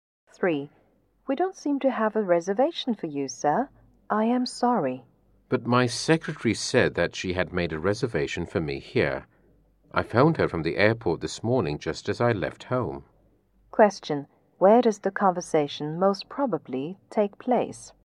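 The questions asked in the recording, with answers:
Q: Where does the conversation most probably take place?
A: At a hotel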